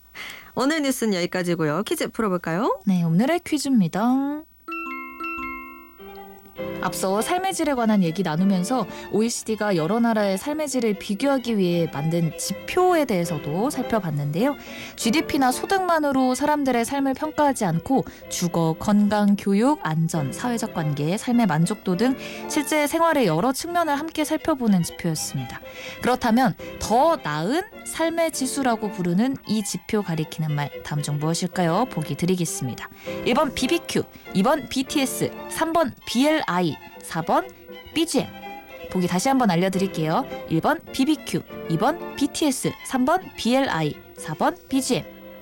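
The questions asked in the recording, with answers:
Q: 그렇다면 더 나은 삶의 지수라고 부르는 이 지표 가리키는 말 다음 중 무엇일까요?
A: 3번: BLI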